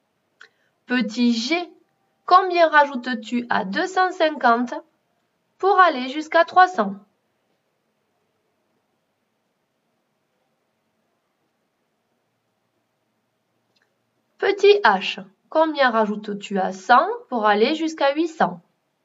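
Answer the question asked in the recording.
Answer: 700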